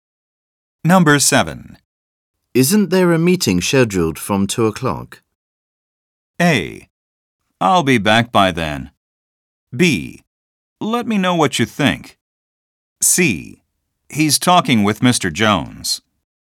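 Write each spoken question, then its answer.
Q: Isn't there a meeting scheduled from 2 o'clock?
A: A: I'll be back by then.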